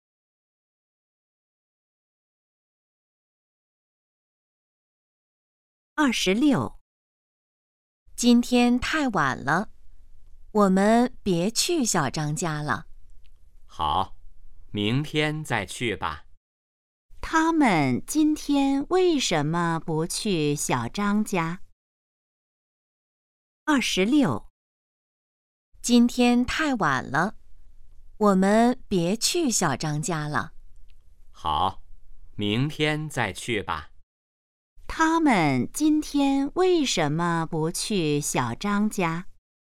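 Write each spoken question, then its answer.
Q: 他们今天为什么不去小张家?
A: 今天太晚了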